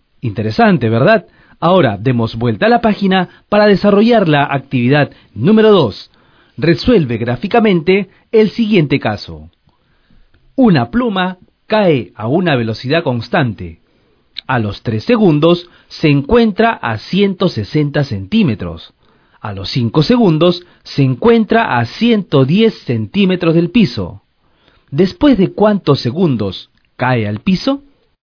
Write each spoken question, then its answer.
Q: ¿Después de cuántos segundos cae al piso?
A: aproximadamente luego de 9,5 segundos, es decir, luego de 9 segundos y medio